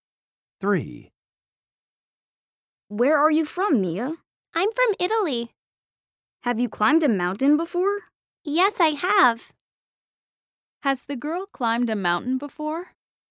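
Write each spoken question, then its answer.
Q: Has the girl climbed a mountain before?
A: Yes, she has.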